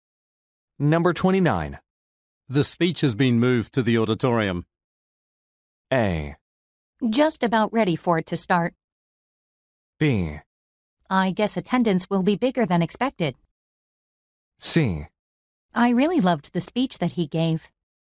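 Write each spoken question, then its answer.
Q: The speech has been moved to the auditorium.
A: B: I guess attendance will be bigger than expected.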